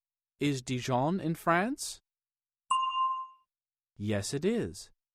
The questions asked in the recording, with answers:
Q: Is Dijon in France?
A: Yes, it is.